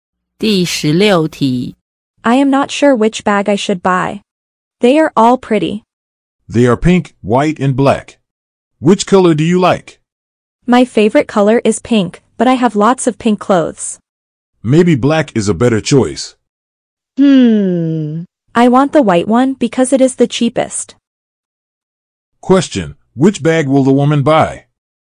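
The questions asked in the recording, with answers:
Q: which bag will the woman buy?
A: The white one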